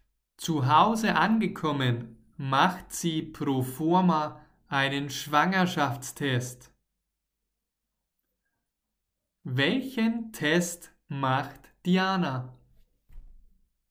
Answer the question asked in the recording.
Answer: Einen Schwangerschaftstest.